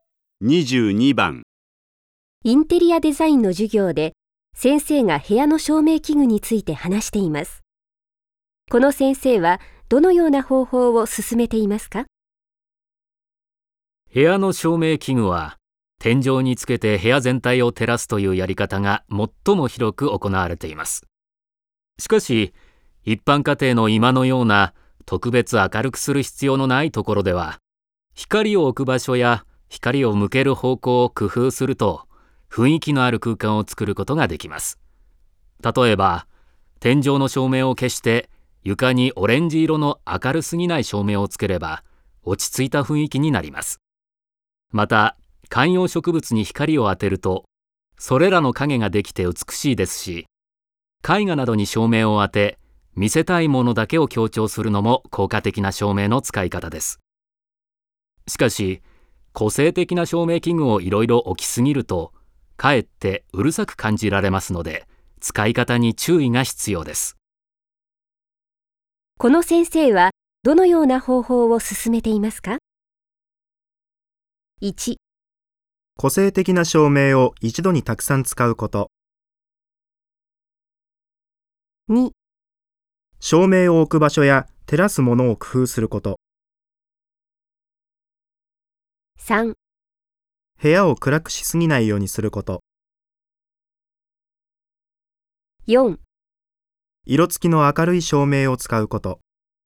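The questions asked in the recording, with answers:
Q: この先生はどのような方法を進めていますか?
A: 2: 照明を置く場所や照らすものを工夫すること。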